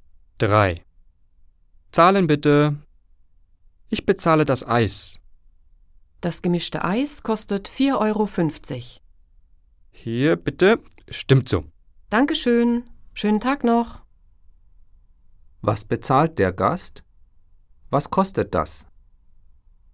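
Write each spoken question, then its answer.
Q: Was bezahlt der Gast? Was kostet das?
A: Ein gemischtes Eis, 4,50 Euro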